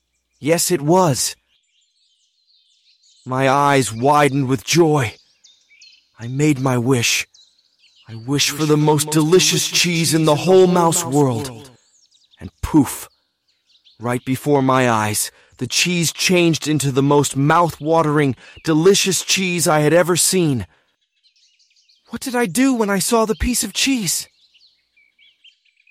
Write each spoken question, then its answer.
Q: What did I do when I saw the piece of cheese?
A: I made my wish.